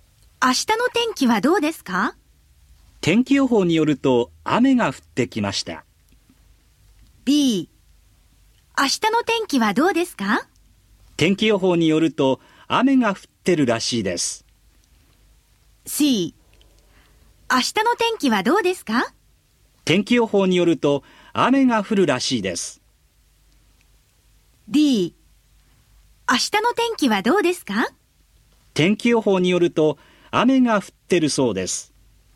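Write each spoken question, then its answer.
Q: 明日の天気はどうですか?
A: C: 天気予報によると雨が降るらしいです。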